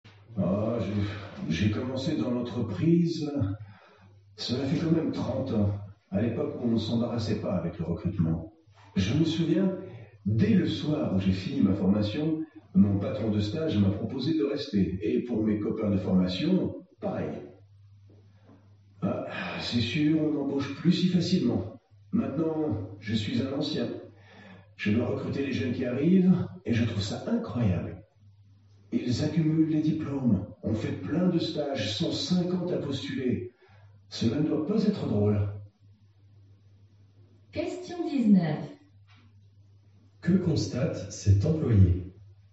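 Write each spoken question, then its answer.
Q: Que constate cet employé ?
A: Il est beaucoup plus difficile d'être embauché aujourd'hui qu'il y a 30 ans : les jeunes sont très diplômés et ont fait des stages, mais ils sont très nombreux à postuler.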